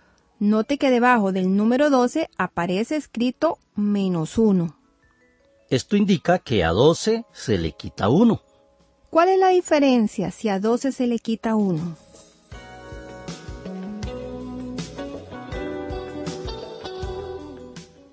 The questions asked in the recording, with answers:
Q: ¿Cuál es la diferencia si a 12 se le quita 1?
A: Claro, la diferencia es 11.